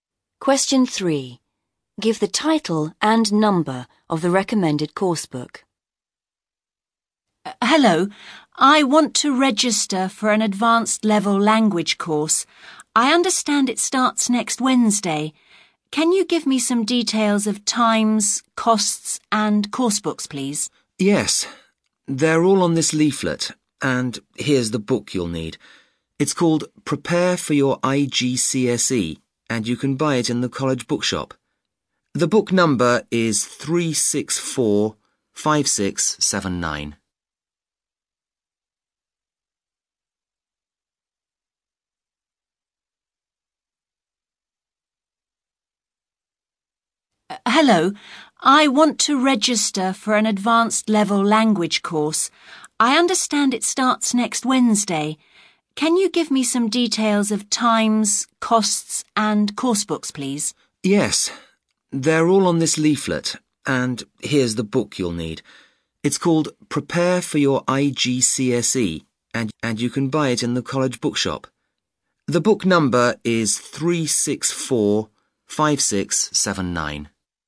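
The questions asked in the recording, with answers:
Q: Give the title and number of the recommended course book.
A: Prepare for Your IGCSE, 364-5679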